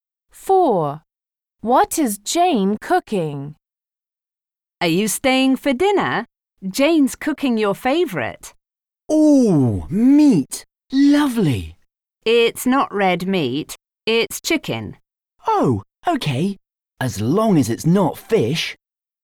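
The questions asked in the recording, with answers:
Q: What is Jane cooking?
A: Chicken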